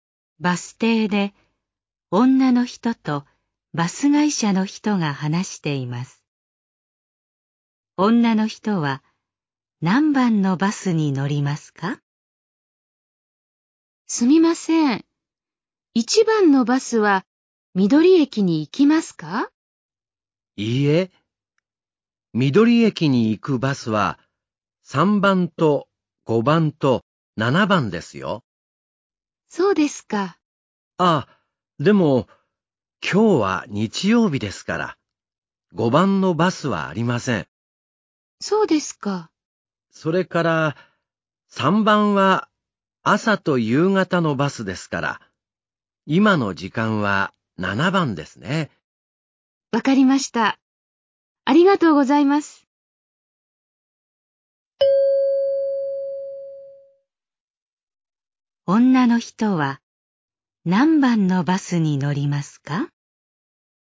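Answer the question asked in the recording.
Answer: 7番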